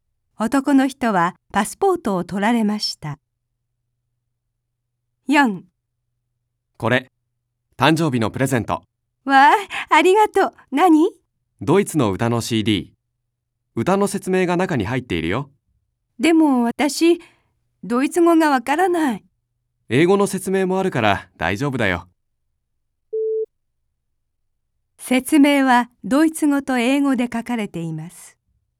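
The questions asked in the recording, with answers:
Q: 説明はドイツ語と英語で書かれています。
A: はい(正しい)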